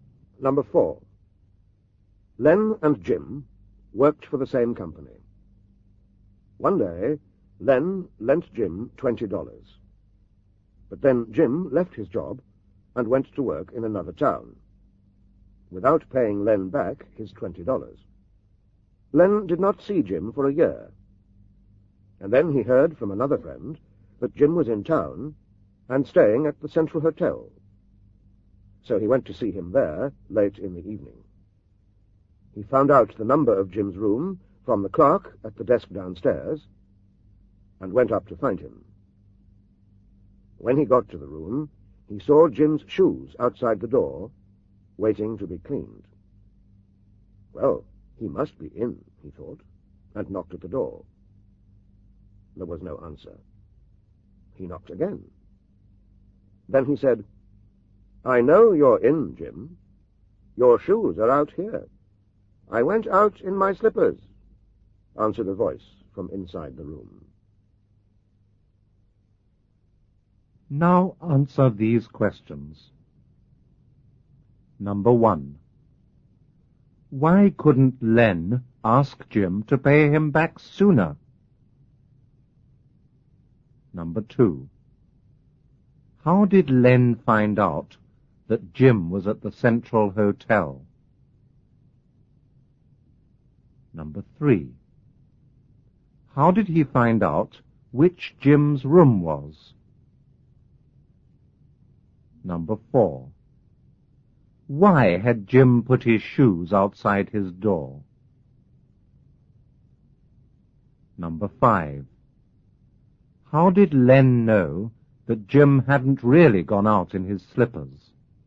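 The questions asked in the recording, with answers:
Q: Why couldn't Len ask Jim to pay him back sooner?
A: Jim had left his job and gone to work in another town, and Len didn't see him for a year

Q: How did Len find out that Jim was at the Central Hotel?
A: Another friend told him

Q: How did he find out which Jim's room was?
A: From the clerk at the desk downstairs

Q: Why had Jim put his shoes outside his door?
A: To be cleaned

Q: How did Len know that Jim hadn't really gone out in his slippers?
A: Jim answered from inside the room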